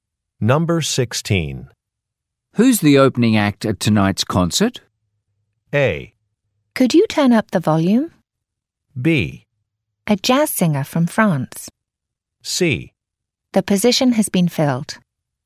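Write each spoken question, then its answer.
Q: Who's the opening act at tonight's concert?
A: B: A jazz singer from France.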